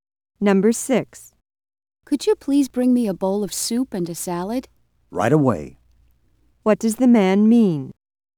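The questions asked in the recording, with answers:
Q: What does the man mean?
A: He will bring the soup and salad immediately.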